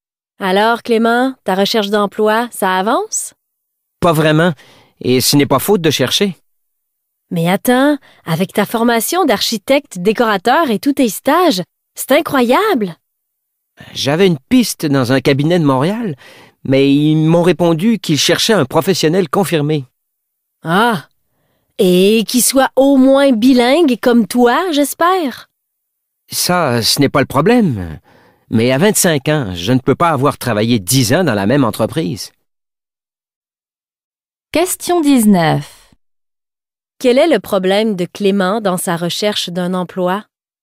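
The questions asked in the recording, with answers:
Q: Quel est le problème de Clément dans sa recherche d'un emploi?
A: Il manque d'expérience professionnelle (on cherche un professionnel confirmé).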